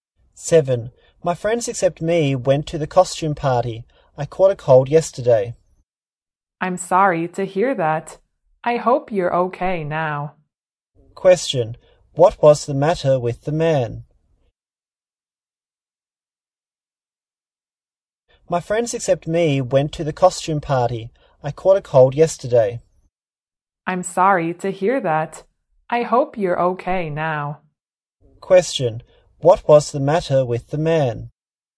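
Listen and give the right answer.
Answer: He caught a cold.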